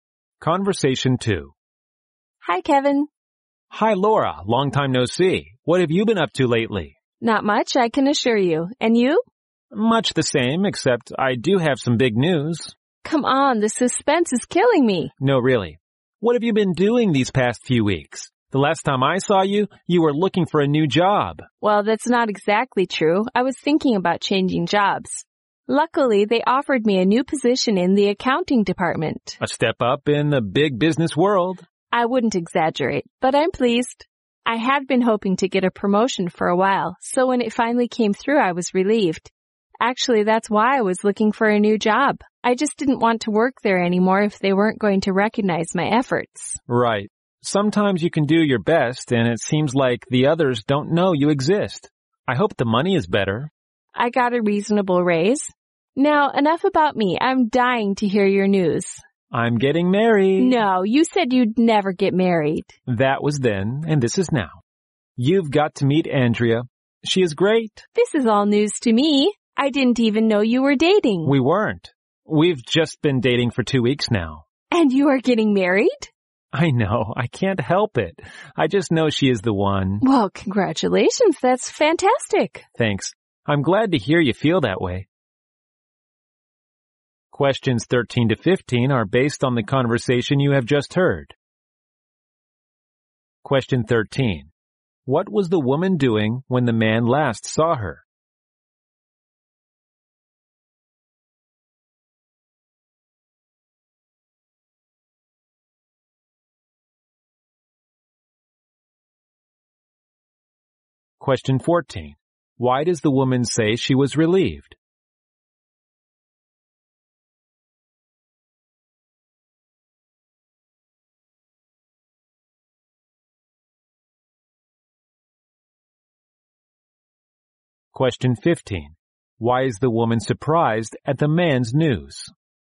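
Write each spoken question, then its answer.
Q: What was the woman doing when the man last saw her?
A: Thinking about changing jobs.

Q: Why does the woman say she was relieved?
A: She finally got the promotion she had been hoping for.

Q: Why is the woman surprised at the man's news?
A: He had said he would never get married, and he has only been dating for two weeks.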